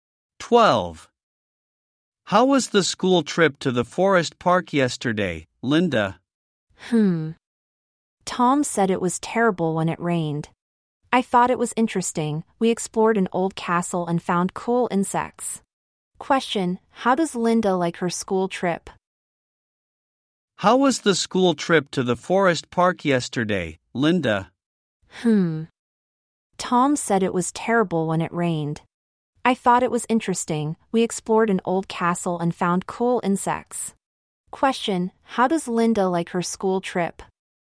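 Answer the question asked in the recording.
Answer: She thought it was interesting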